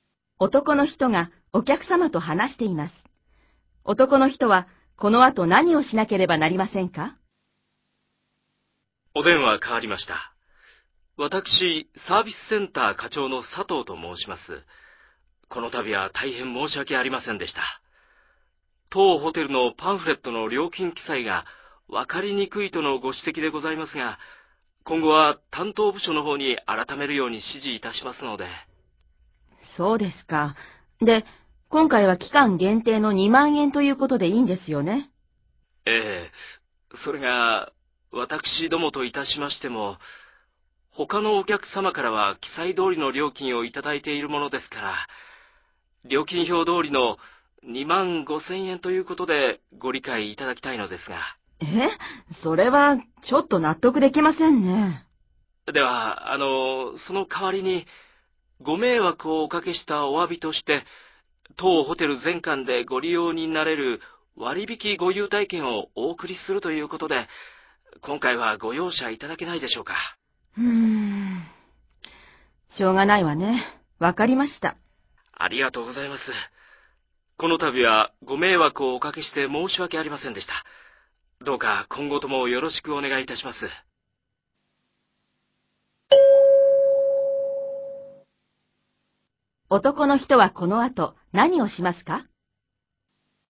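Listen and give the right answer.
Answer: お客様にホテル全館で使える割引優待券を送る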